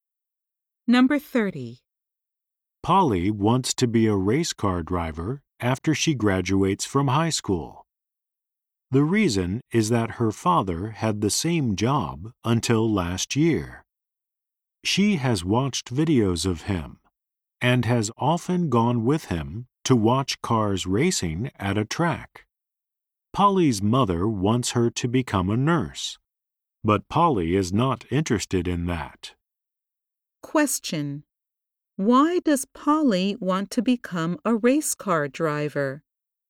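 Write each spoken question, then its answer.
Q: Why does Polly want to become a race car driver?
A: Her father had the same job until last year.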